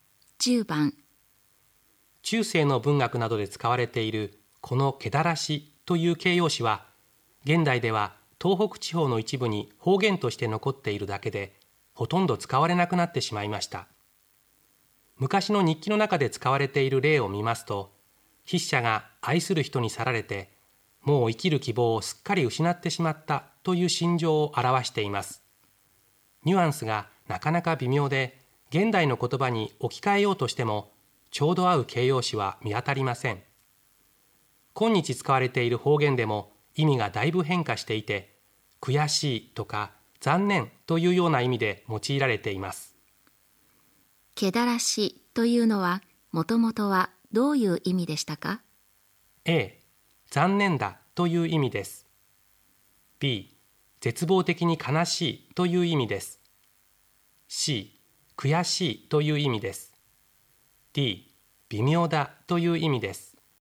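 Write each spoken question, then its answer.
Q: けだらしというのはもともとはどういう意味でしたか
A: B: 絶望的に悲しいという意味です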